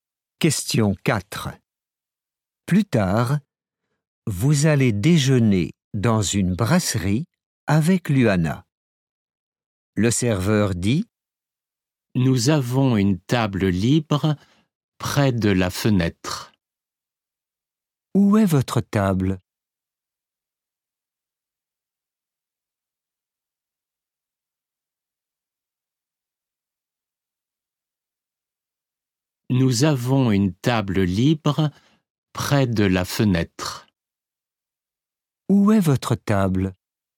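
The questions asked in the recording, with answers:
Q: Où est votre table?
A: Près de la fenêtre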